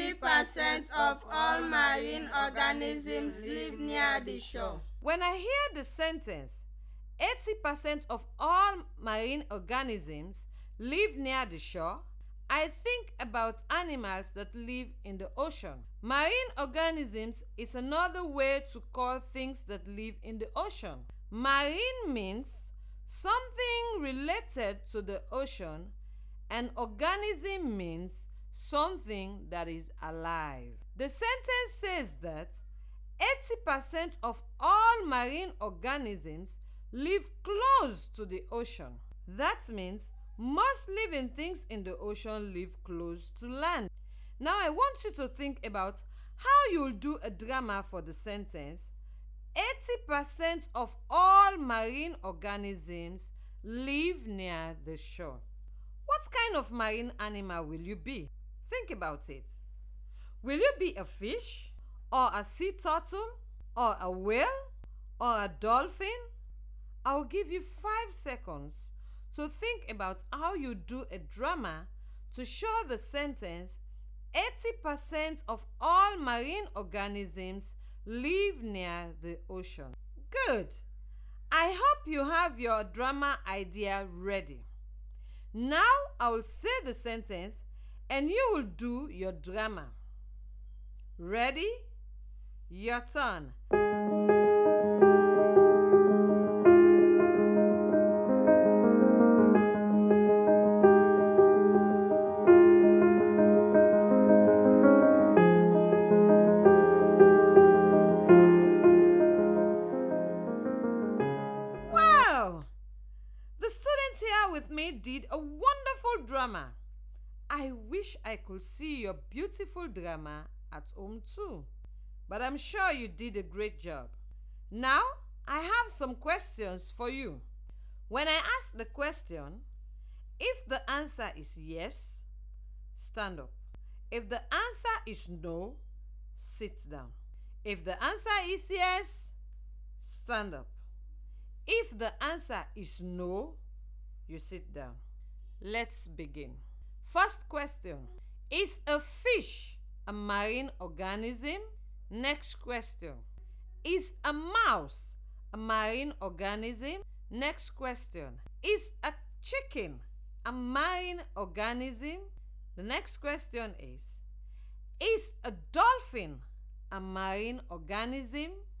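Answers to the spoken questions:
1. Yes
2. No
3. No
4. Yes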